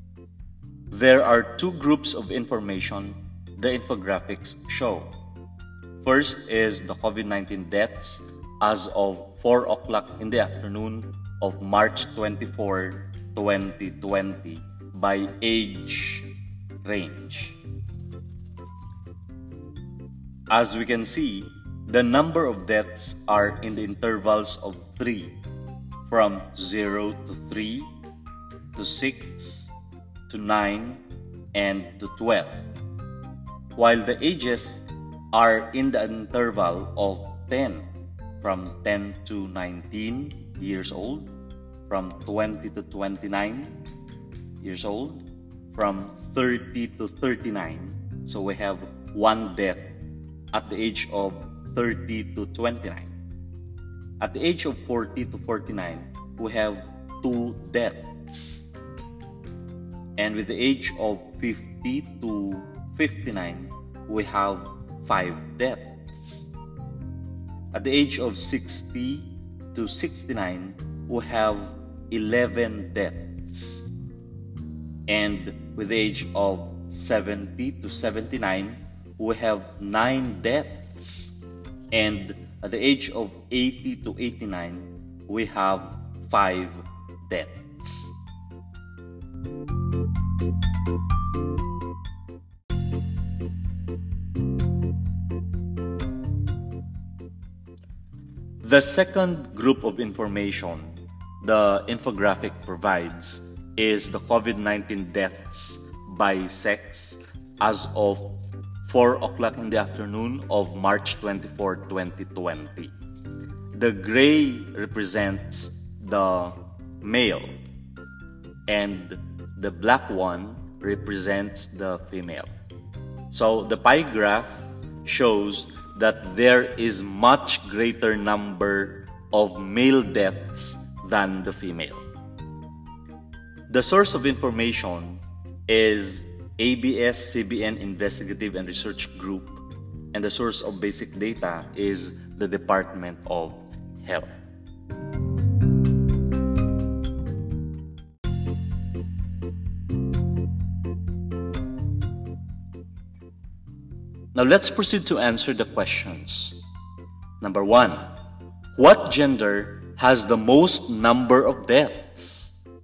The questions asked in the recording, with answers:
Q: what gender has the most number of deaths?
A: We have said that the males, right?